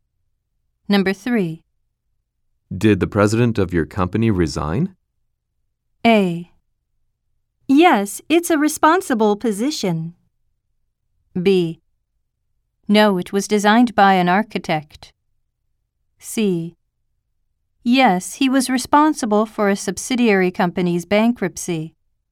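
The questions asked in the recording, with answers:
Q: Did the president of your company resign?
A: C: Yes, he was responsible for a subsidiary company's bankruptcy.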